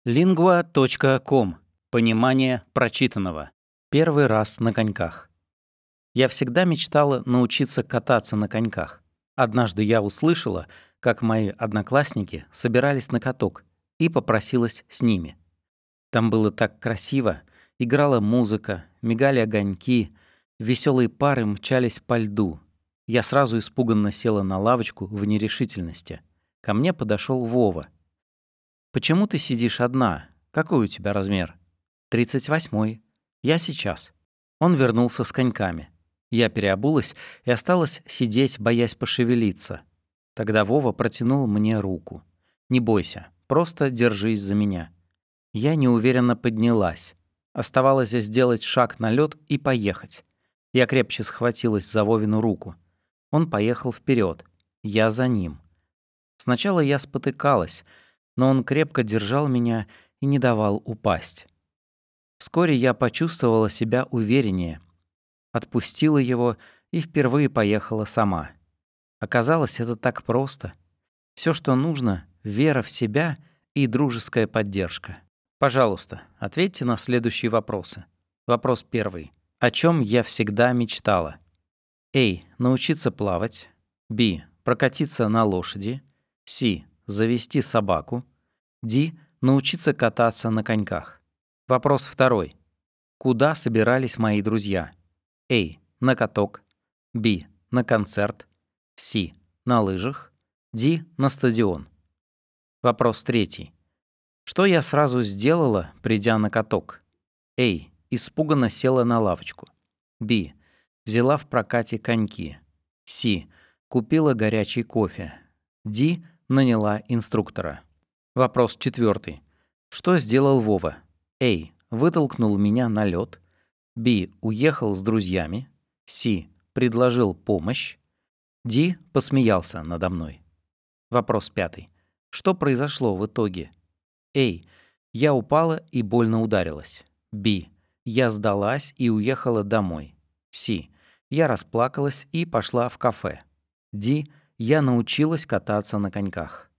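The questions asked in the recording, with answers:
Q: О чем я всегда мечтала?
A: D: Научиться кататься на коньках.

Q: Куда собирались мои друзья?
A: A: На каток.

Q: Что я сразу сделала, придя на каток?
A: A: Испуганно села на лавочку.

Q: Что сделал Вова?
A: C: Предложил помощь.

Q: Что произошло в итоге?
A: D: Я научилась кататься на коньках.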